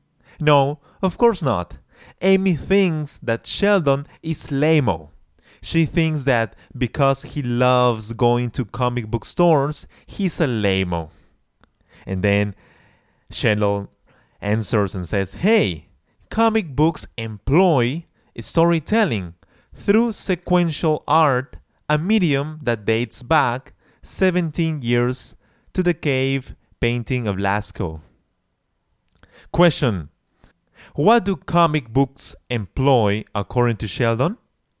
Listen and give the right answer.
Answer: Sheldon states that comic books employ storytelling through sequential art.